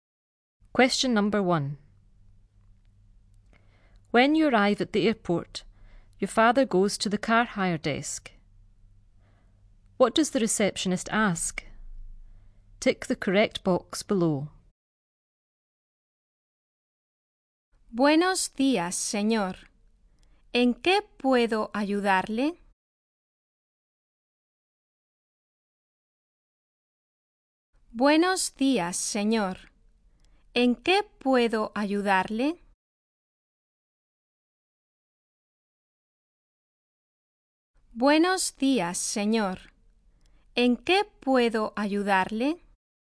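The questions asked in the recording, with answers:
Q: What does the receptionist ask?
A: How can I help you?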